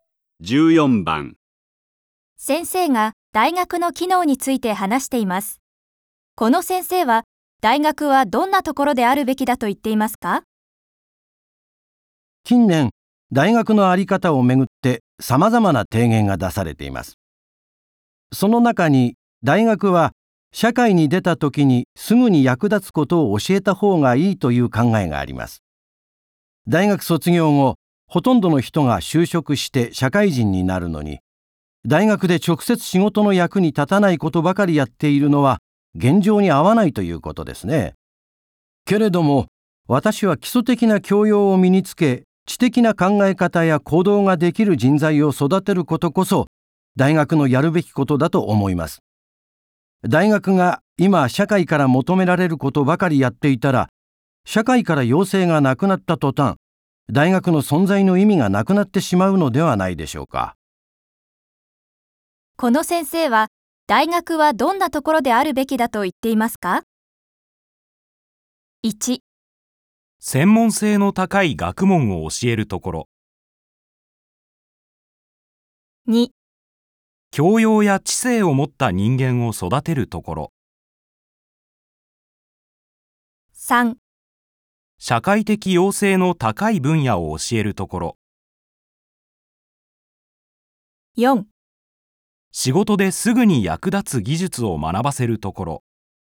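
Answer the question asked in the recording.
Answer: 2: 教養や知性を持った人間を育てるところ。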